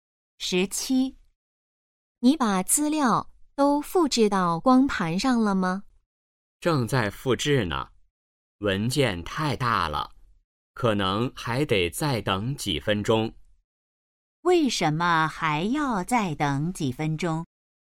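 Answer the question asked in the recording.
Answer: 文件太大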